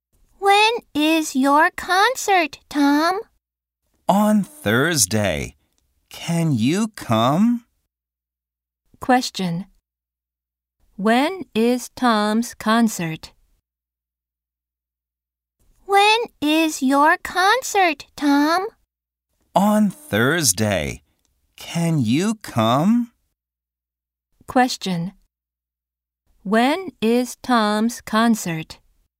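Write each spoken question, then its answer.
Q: Question. When is Tom's concert?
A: On Thursday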